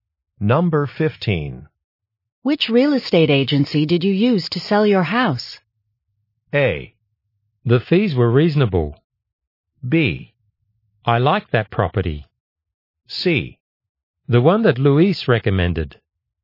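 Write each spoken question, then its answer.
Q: Which real estate agency did you use to sell your house?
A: C: The one that Luis recommended.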